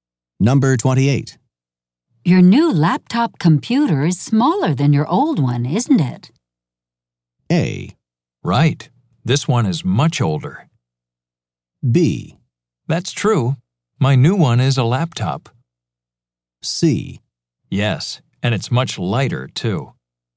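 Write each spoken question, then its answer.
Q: Your new laptop computer is smaller than your old one, isn't it?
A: C: Yes, and it's much lighter, too.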